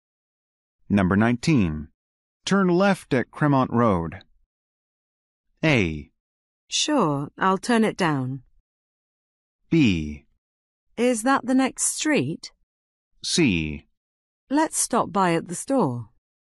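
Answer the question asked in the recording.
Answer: B: Is that the next street?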